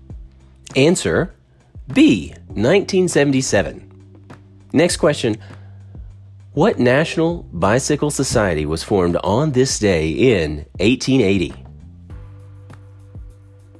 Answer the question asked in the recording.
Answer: Answer, the League of American Wheelmen.